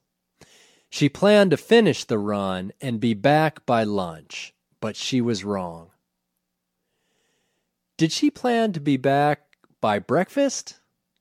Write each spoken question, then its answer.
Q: Did she plan to be back by breakfast?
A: No, she didn't plan to be back by breakfast.